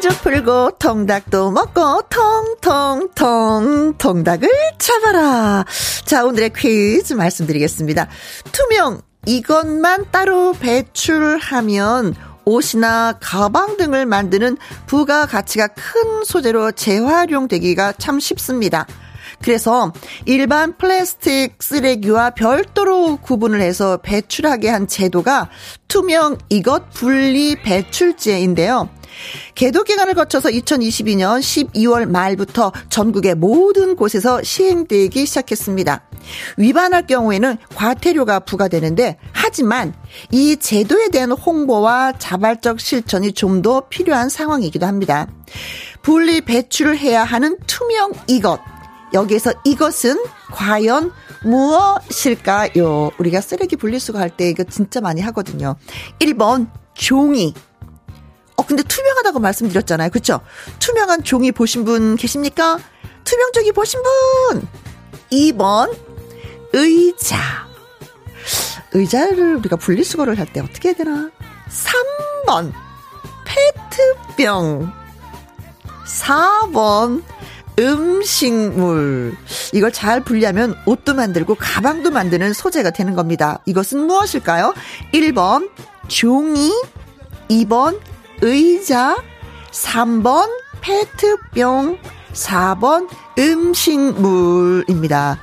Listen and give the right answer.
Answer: 자, 그래서 정답은 페트병입니다.